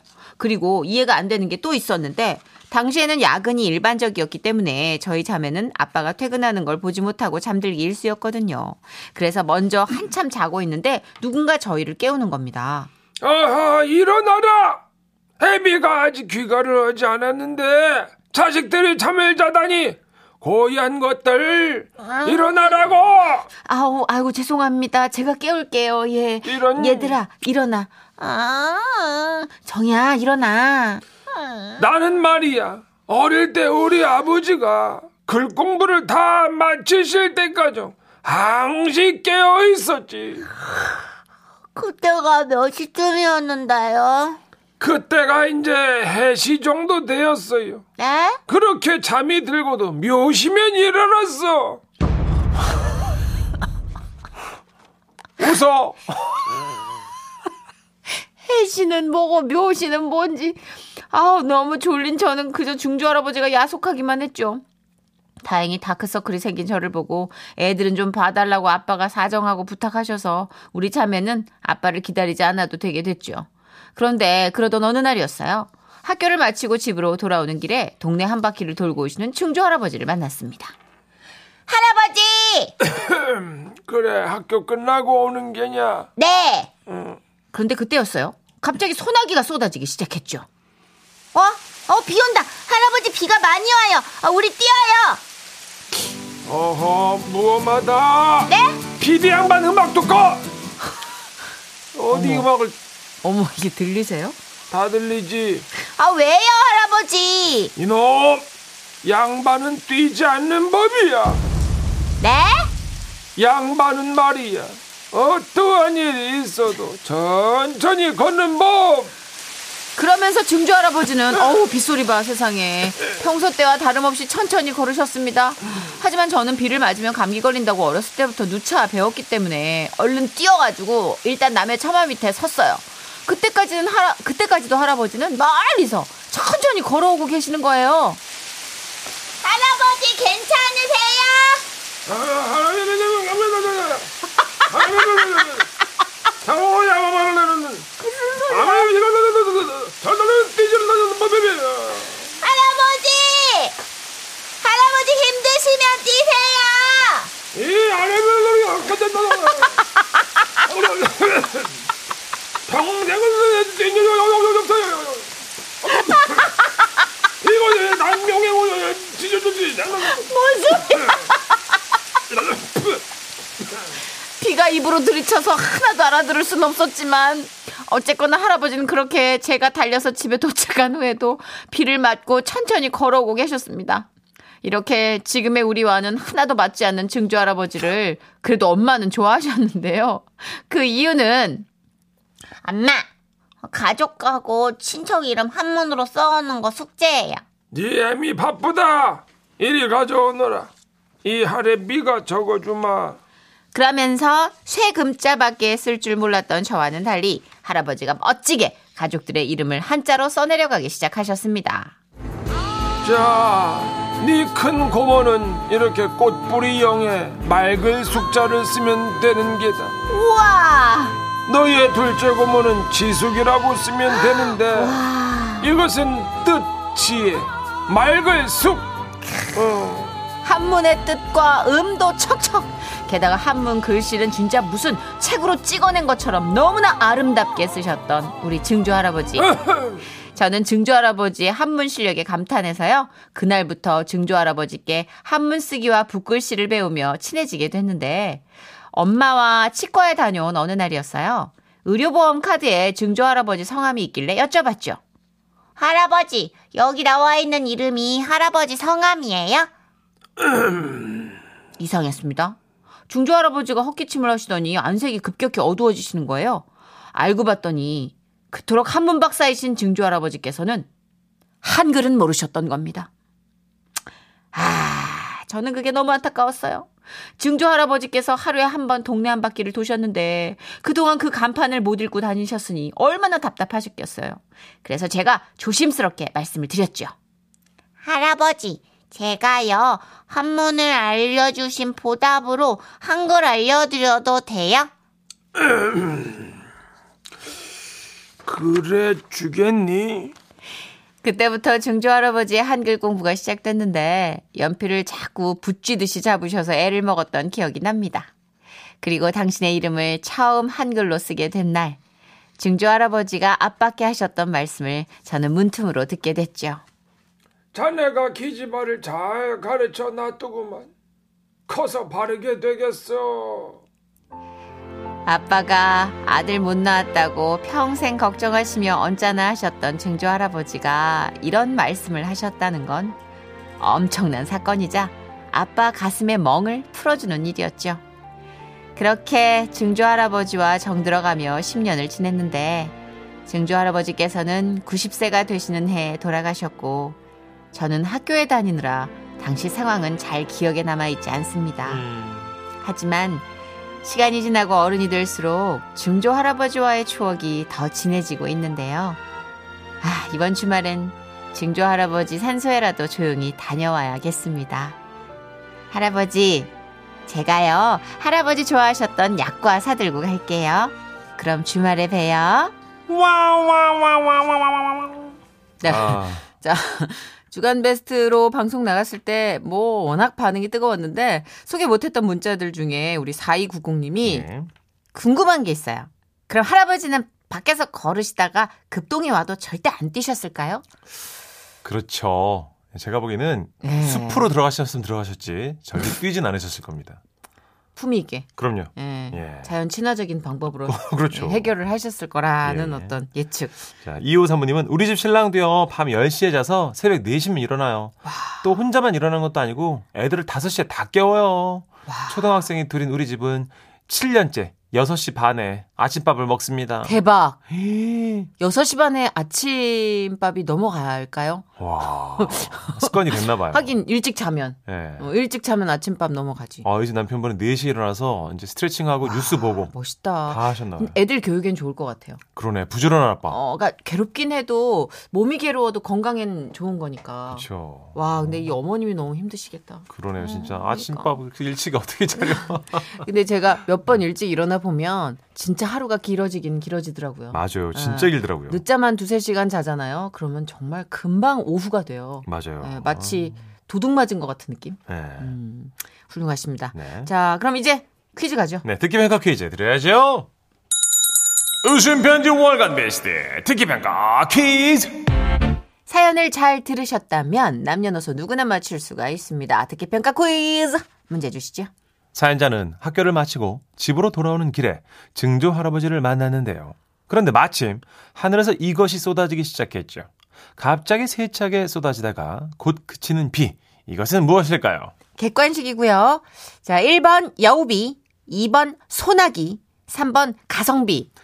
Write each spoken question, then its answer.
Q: 갑자기 세차게 쏟아지다가 곧 그치는 비. 이것은 무엇일까요?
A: 2번 소나기였습니다.